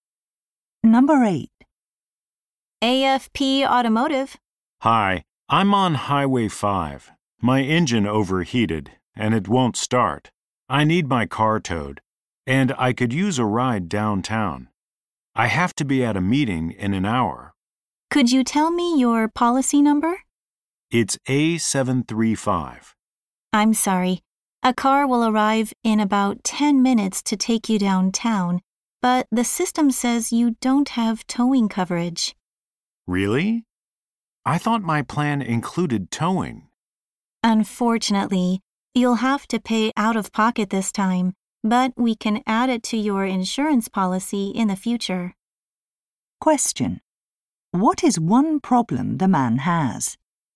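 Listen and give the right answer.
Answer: His insurance doesn't cover towing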